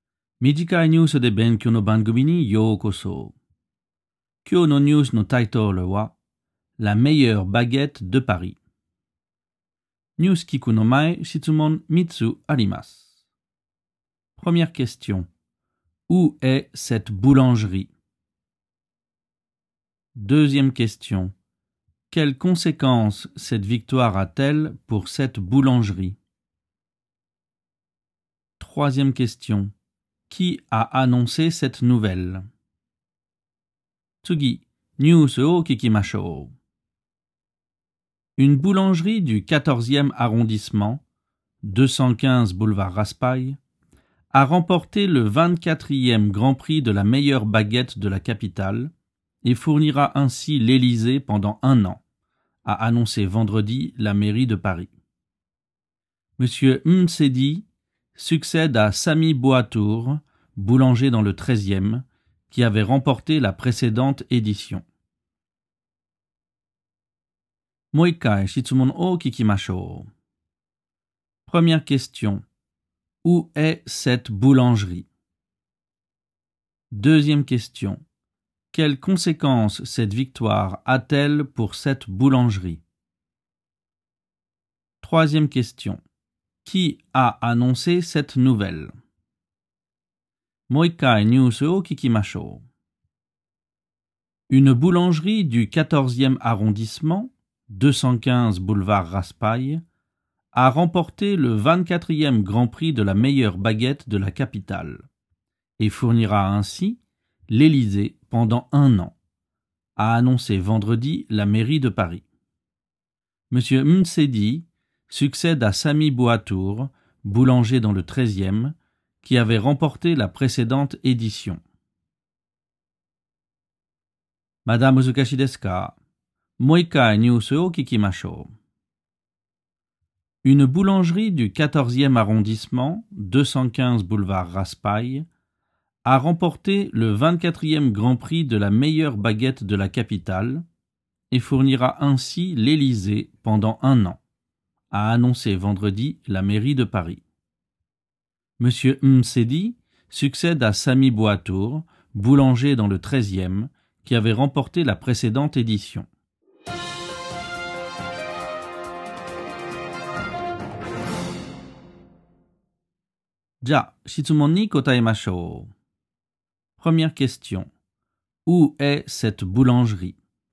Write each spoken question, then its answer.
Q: Où est cette boulangerie?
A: Cette boulangerie est au 215 boulevard Raspail, dans le 14e arrondissement.

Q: Quelles conséquences cette victoire a-t-elle pour cette boulangerie?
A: Comme elle a gagné ce grand prix, la boulangerie est devenue le fournisseur officiel du palais de l'Élysée.

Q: Qui a annoncé cette nouvelle?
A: C'est la mairie de Paris qui a annoncé cette nouvelle.